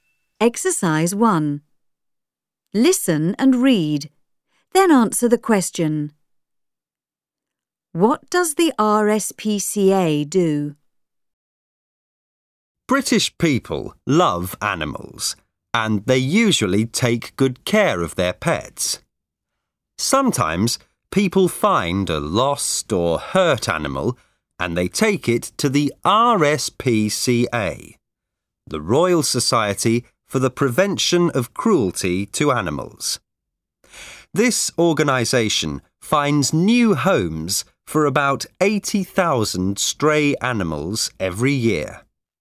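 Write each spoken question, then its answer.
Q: What does the RSPCA do?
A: It takes in lost or hurt animals and finds new homes for about 80,000 stray animals every year.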